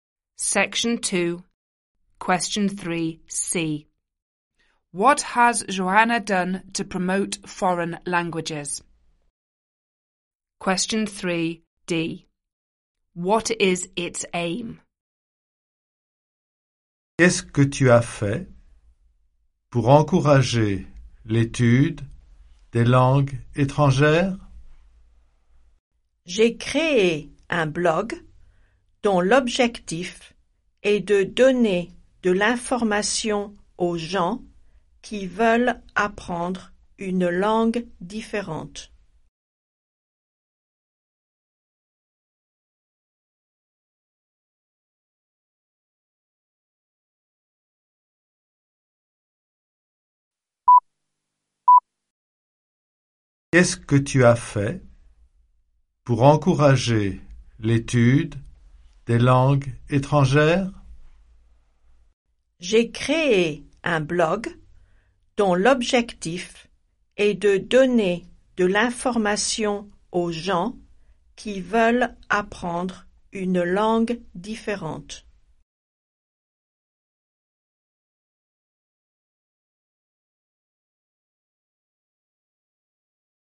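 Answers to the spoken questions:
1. She created a blog
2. To give information to people who want to learn a different language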